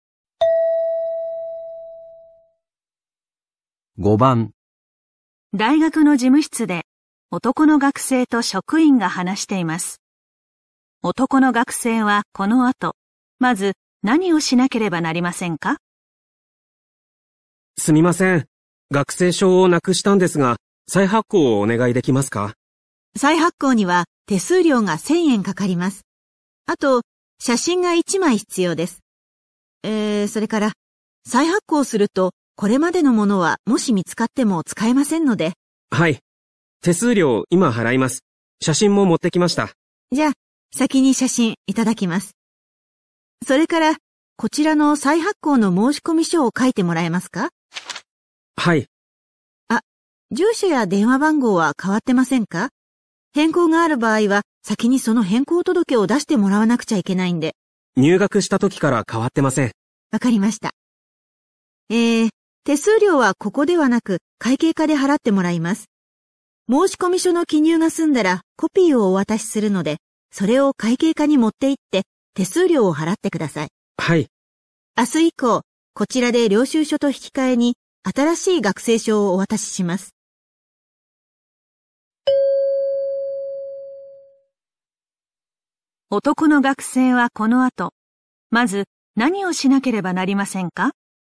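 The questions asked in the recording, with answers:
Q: 男の学生はこの後、まず何をしなければなりませんか?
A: 再発行の申込書を書く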